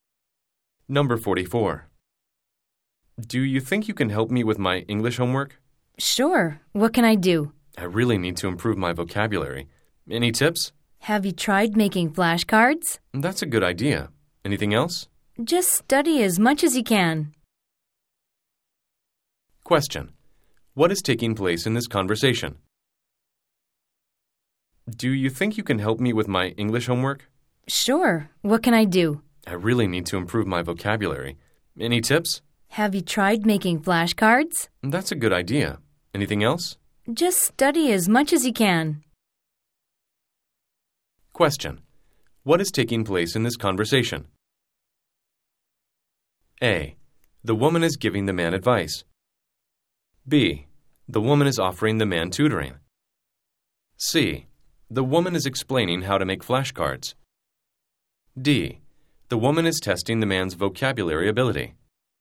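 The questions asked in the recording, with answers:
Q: What is taking place in this conversation?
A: A: The woman is giving the man advice.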